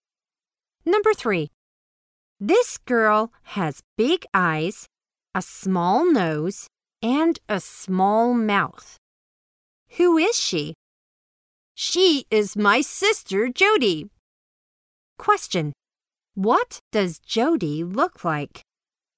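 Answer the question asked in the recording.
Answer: She has big eyes, a small nose and a small mouth.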